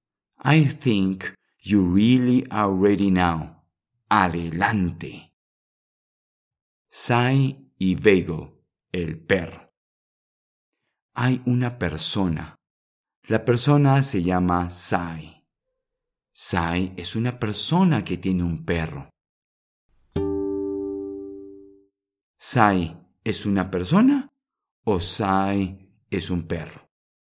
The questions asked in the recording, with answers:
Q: Sai es una persona o Sai es un perro.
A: Sí, tienes razón. Sai es una persona que tiene un perro.